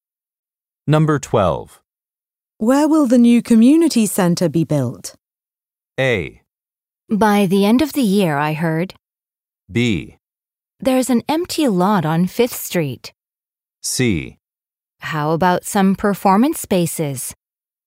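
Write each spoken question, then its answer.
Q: Where will the new community center be built?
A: B: There's an empty lot on 5th Street.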